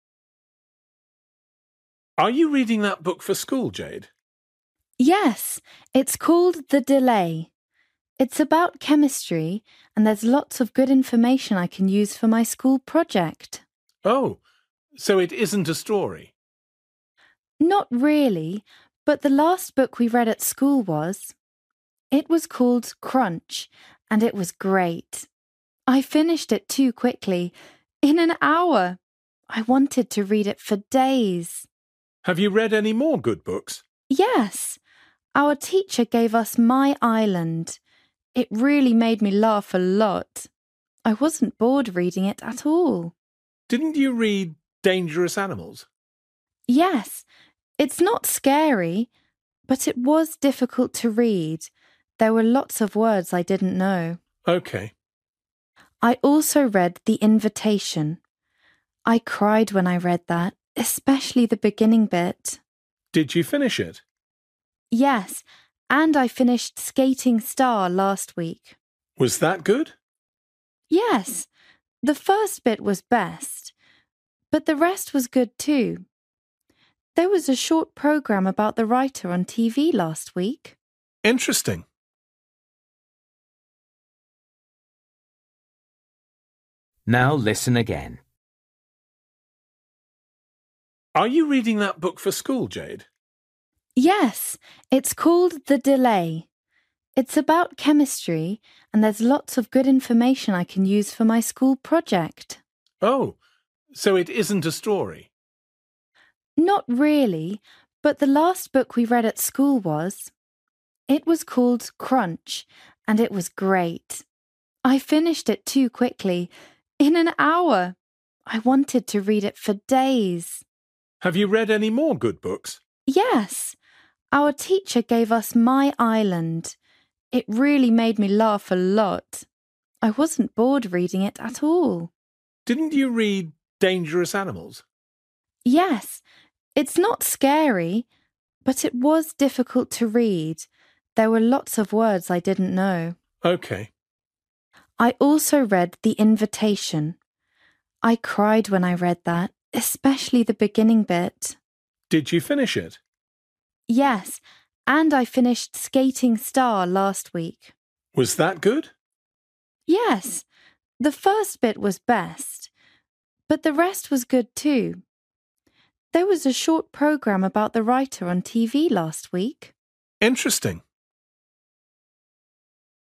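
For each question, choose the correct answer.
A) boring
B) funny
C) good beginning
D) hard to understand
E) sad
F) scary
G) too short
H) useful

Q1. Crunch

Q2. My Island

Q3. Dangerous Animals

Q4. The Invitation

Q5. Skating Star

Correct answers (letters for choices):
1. G
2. B
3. D
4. E
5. C

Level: Luyện nghe trình độ A2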